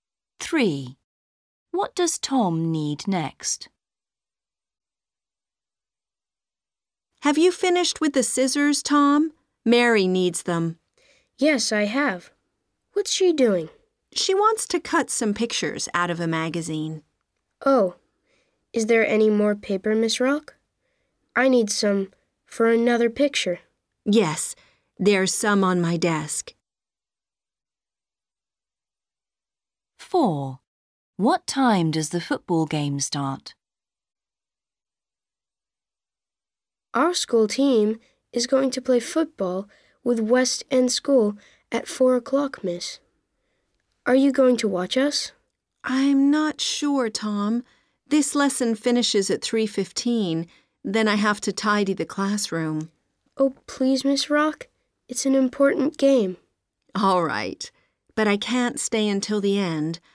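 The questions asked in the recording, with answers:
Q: What does Tom need next?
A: Paper

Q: What time does the football game start?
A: 4 o'clock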